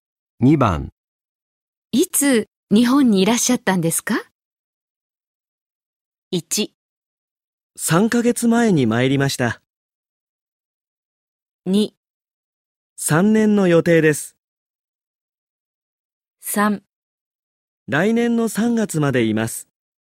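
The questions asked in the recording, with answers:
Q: いつ日本にいらっしゃったんですか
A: 1: 3ヶ月前に参りました。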